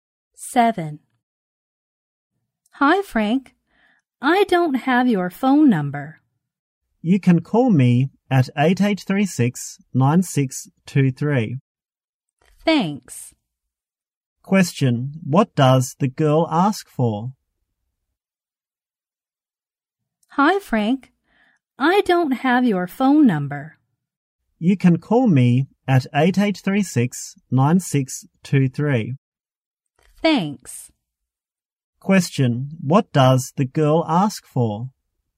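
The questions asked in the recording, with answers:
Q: What does the girl ask for?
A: Frank's phone number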